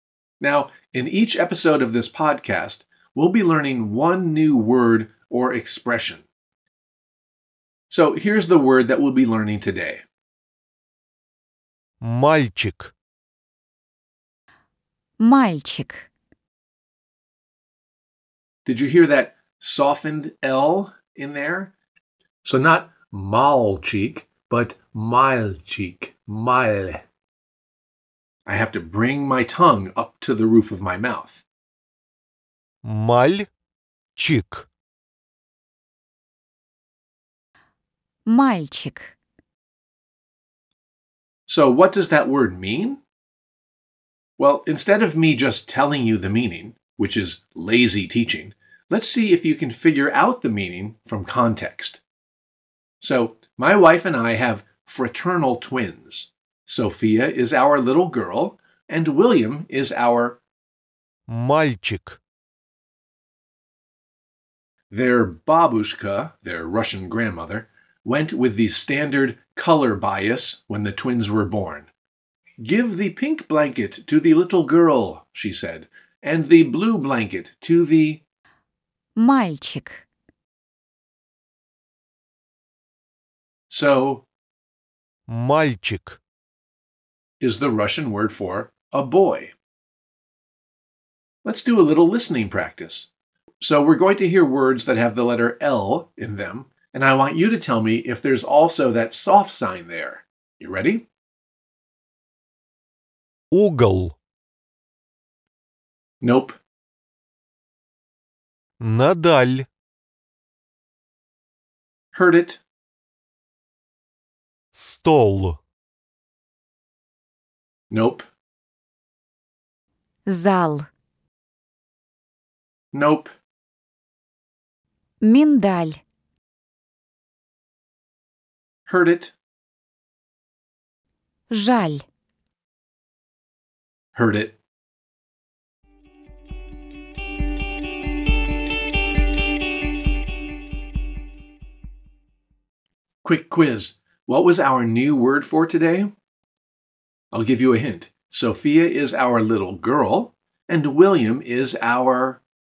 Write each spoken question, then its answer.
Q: Quick quiz. What was our new word for today?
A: Мальчик.